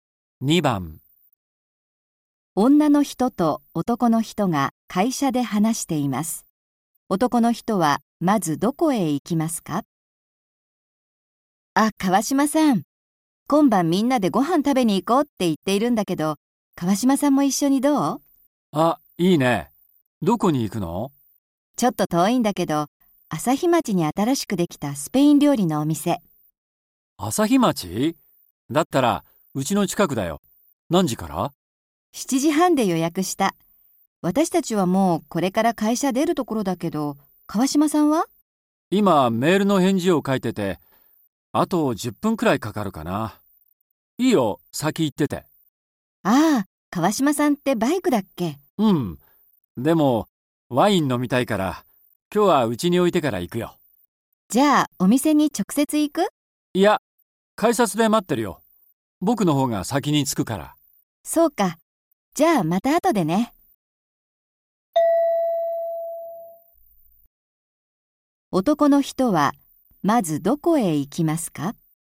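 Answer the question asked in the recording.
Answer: 自分の家(バイクを置きに)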